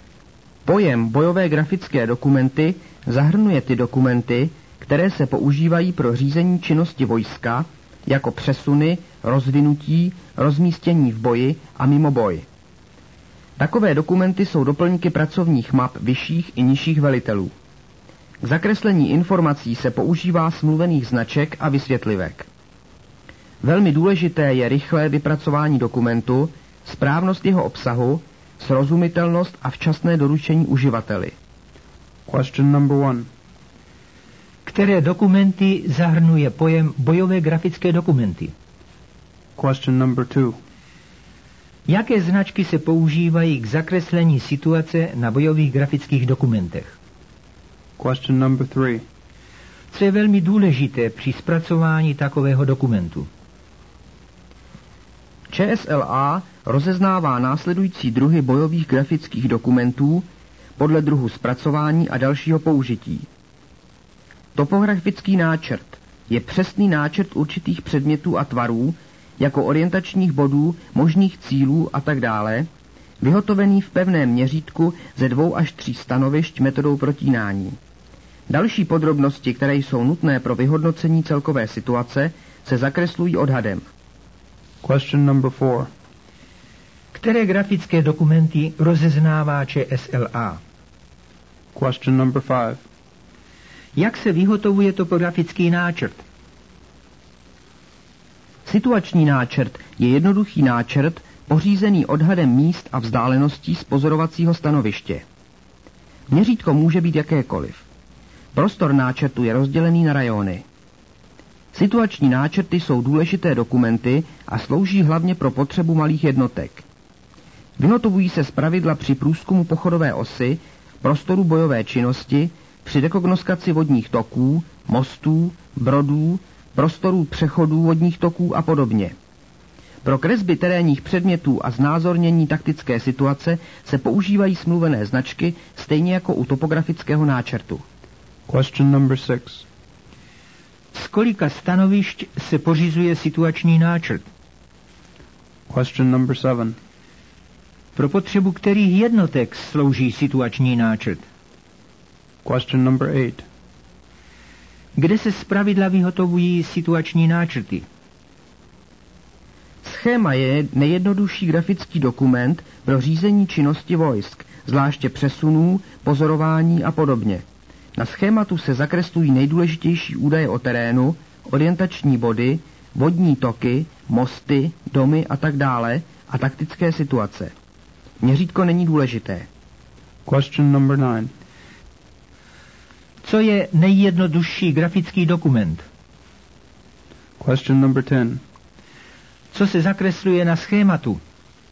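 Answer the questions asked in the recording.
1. Dokumenty používané pro řízení činnosti vojska (přesuny, rozvinutí, rozmístění v boji a mimo boj)
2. Smluvené značky a vysvětlivky
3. Rychlé vypracování, správnost obsahu, srozumitelnost a včasné doručení uživateli
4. Topografický náčrt, situační náčrt a schéma
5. V pevném měřítku ze 2 až 3 stanovišť metodou protínání
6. Z jednoho pozorovacího stanoviště
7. Malých jednotek
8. Při průzkumu pochodové osy, prostorů bojové činnosti, při rekognoskaci vodních toků, mostů, brodů a přechodů
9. Schéma
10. Nejdůležitější údaje o terénu (orientační body, vodní toky, mosty, domy) a taktická situace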